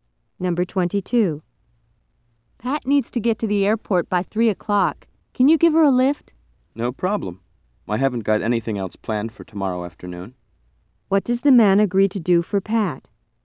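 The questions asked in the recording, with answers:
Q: What does the man agree to do for Pat?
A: Drive her to the airport.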